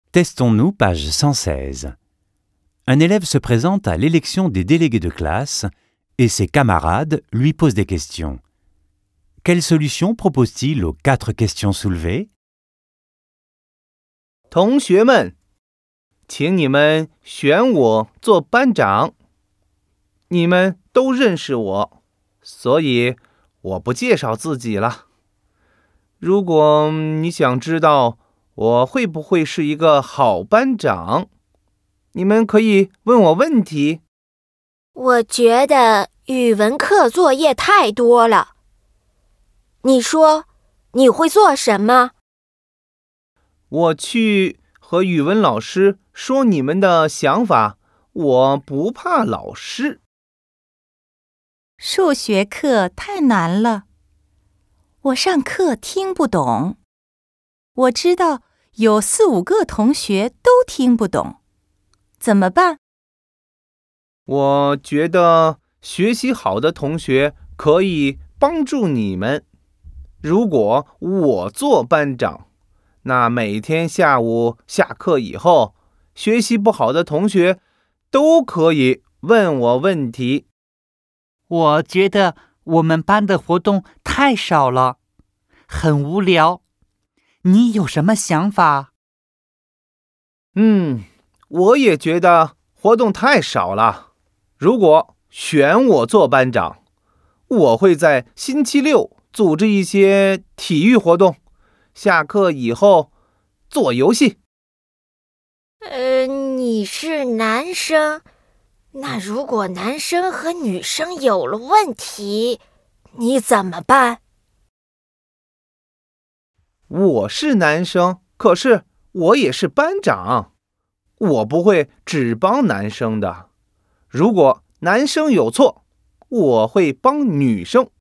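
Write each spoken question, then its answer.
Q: Quelle solution propose-t-il aux quatre questions soulevées?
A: Trop de devoirs de chinois : il en parlera au professeur de chinois. Maths trop difficiles : les bons élèves aideront, et lui répondra aux questions chaque après-midi après les cours. Trop peu d'activités : il organisera des activités sportives le samedi et des jeux après les cours. Problèmes entre garçons et filles : il ne favorisera pas les garçons et, si les garçons ont tort, il aidera les filles.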